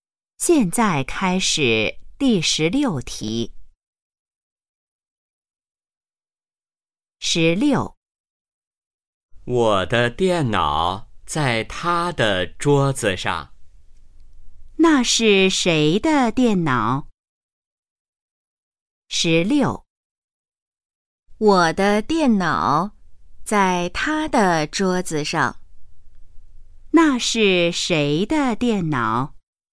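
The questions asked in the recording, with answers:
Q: 那是谁的电脑?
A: 我的(说话人的)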